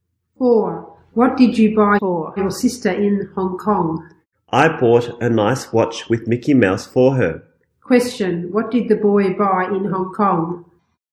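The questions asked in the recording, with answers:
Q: What did the boy buy in Hong Kong?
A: A watch with Mickey Mouse.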